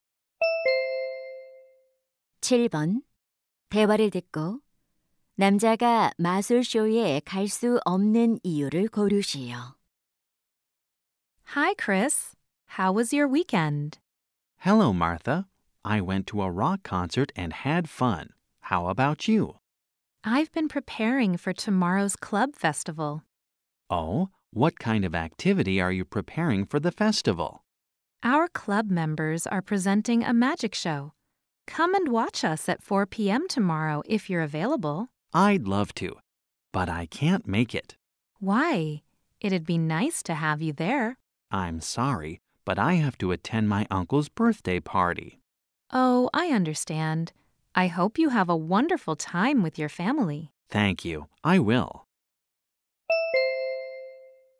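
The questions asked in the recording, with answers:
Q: 남자가 마술쇼에 갈 수 없는 이유를 고르시오.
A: 삼촌의 생일 파티에 가야 해서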